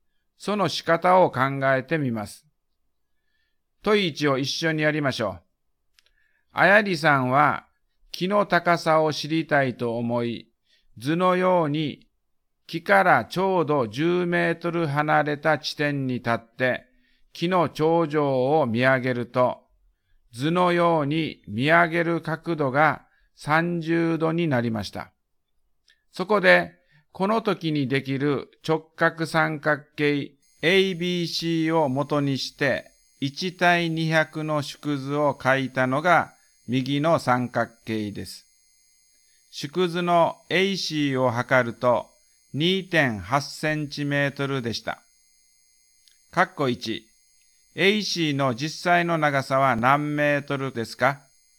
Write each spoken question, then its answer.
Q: 括弧1、AC の実際の長さは何メートルですか?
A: 560センチメートルになったと思います。